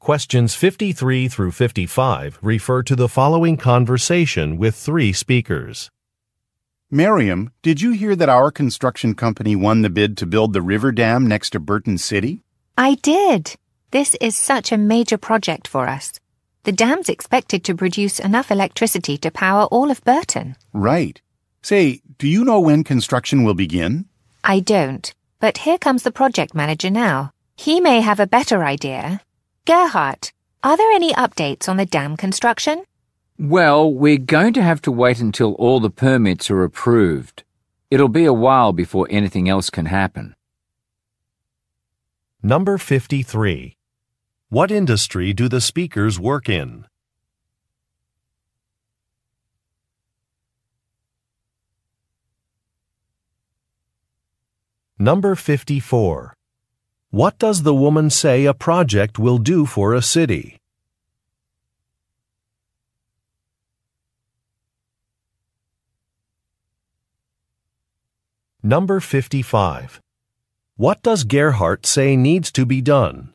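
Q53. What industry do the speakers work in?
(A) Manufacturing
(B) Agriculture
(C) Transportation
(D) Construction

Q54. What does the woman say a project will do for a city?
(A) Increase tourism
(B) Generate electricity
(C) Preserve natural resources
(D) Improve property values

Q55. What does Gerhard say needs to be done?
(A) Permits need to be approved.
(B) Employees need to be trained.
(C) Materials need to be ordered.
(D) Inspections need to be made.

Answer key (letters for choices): 53D, 54B, 55A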